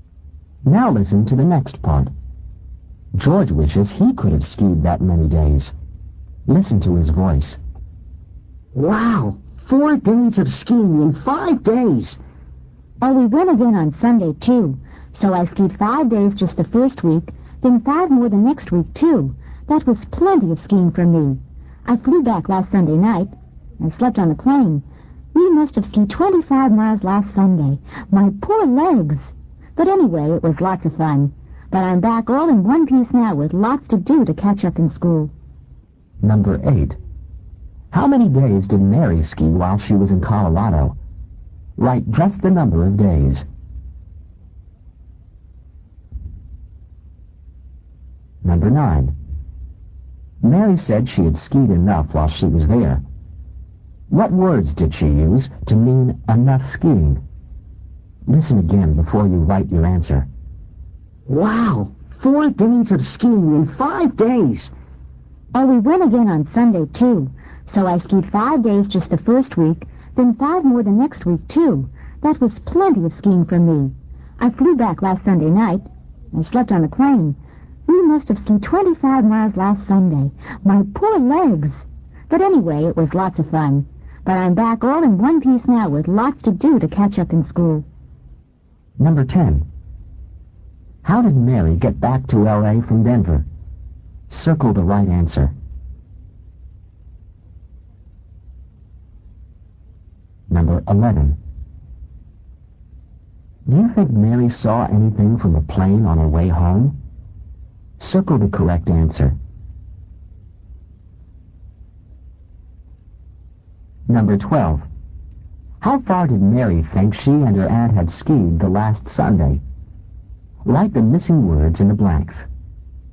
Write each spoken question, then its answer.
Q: How many days did Mary ski while she was in Colorado?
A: Number 8, 10.

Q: What words did she use to mean enough skiing?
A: Number 9, that was plenty.

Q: How far did Mary think she and her aunt had skied the last Sunday?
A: Number 12, they must, M-U-S-T, have skied 25 miles